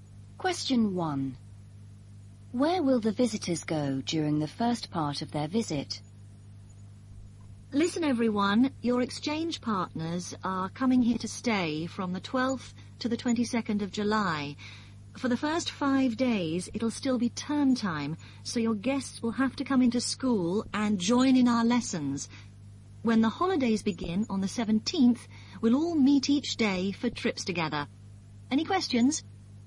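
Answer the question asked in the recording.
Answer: To school, to join in lessons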